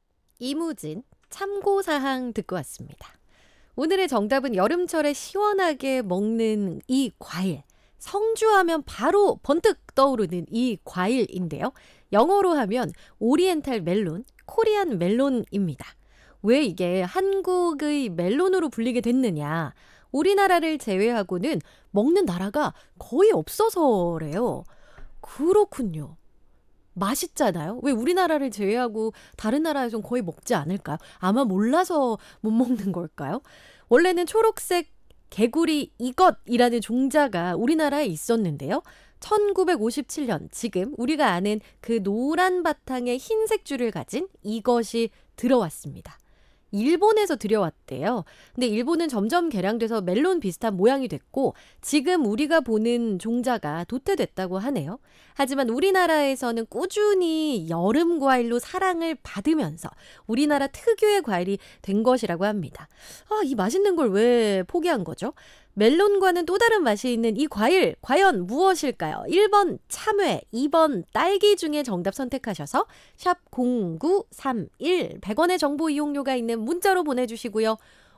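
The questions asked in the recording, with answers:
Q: 멜론과는 또 다른 맛이 있는 이 과일 과연 무엇일까요?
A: 1번: 참외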